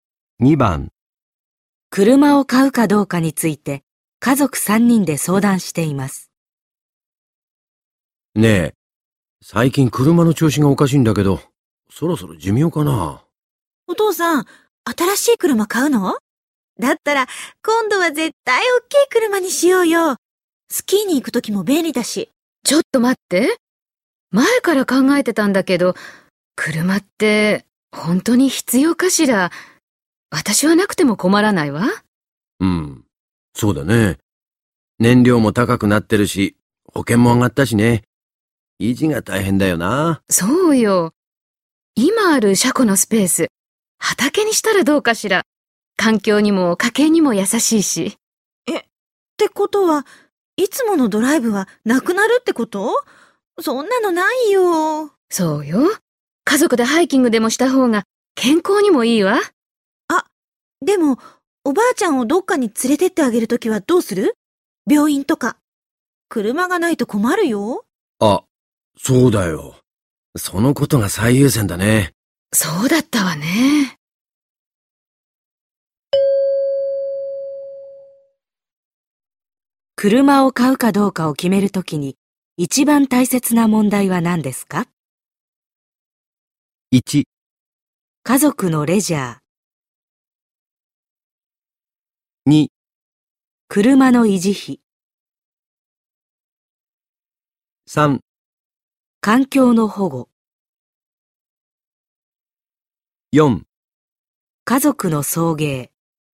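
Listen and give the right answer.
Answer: 4: 家族の送迎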